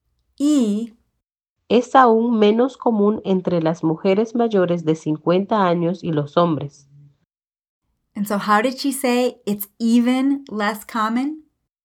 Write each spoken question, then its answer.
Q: And so how did she say it's even less common?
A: Es aún menos común.